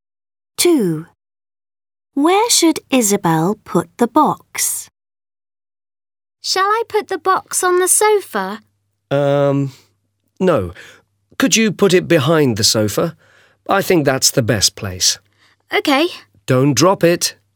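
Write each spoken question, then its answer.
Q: Where should Isabel put the box?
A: behind the sofa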